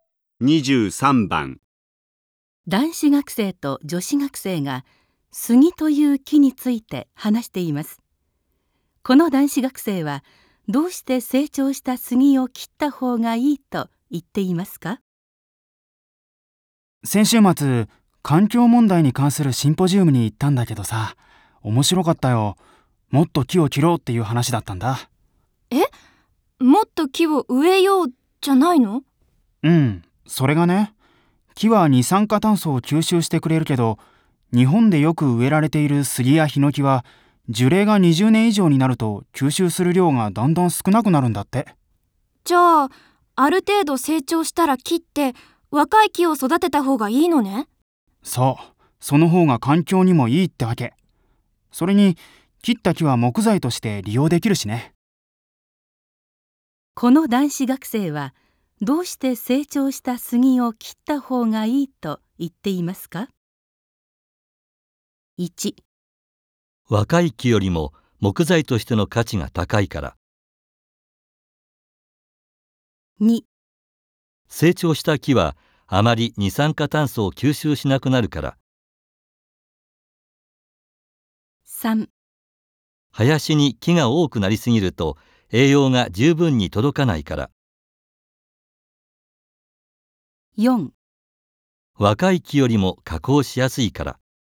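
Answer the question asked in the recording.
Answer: 2: 成長した木はあまり二酸化炭素を吸収しなくなるから。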